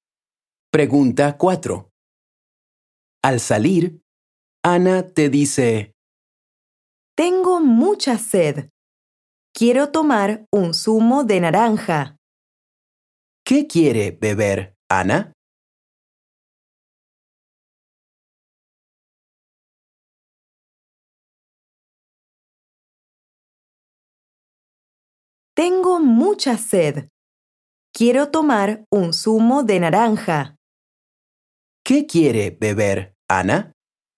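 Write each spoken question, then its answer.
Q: ¿Qué quiere beber, Ana?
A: Un zumo de naranja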